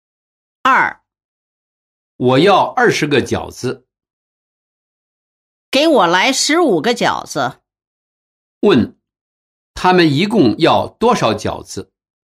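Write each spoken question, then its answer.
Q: 问,他们一共要多少饺子?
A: 35个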